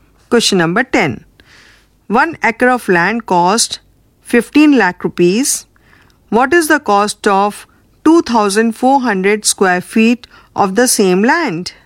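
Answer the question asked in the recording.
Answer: About 82,645 rupees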